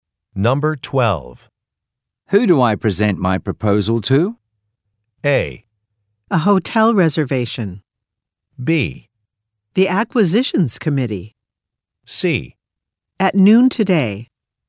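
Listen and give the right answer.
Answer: B: The acquisitions committee.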